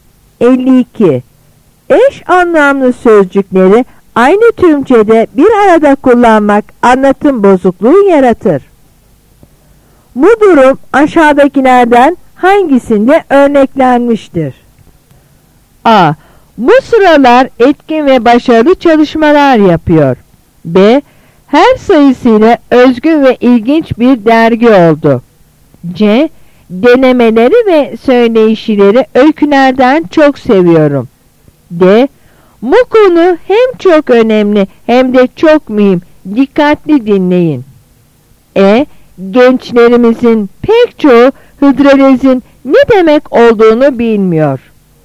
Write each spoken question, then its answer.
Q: Bu durum aşağıdakilerden hangisinde örneklenmiştir?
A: Yanıt D.